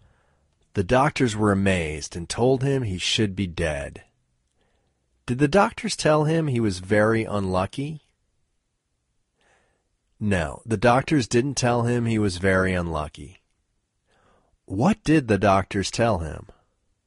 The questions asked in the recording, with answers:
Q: What did the doctors tell him?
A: The doctors told him he should be dead.